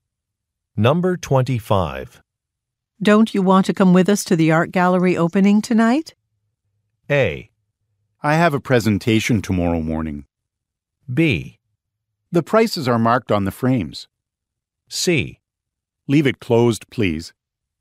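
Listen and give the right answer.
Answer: A: I have a presentation tomorrow morning.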